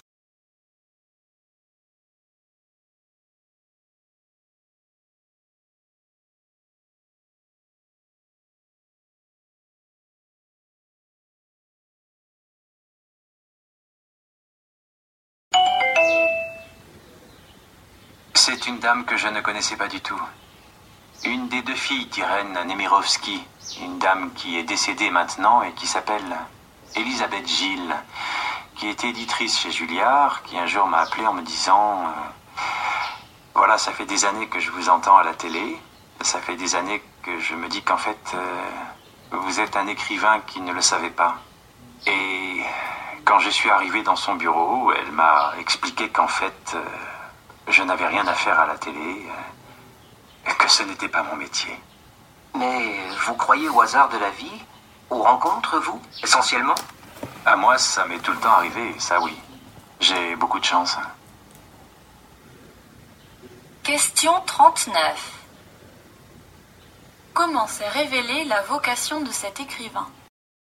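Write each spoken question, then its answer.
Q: Comment s'est révélée la vocation de cet écrivain ?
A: Grâce à une éditrice qui l'a appelé par hasard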